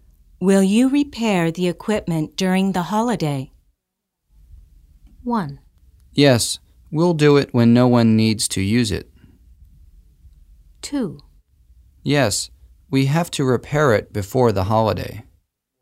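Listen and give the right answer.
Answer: 1: Yes, we'll do it when no one needs to use it.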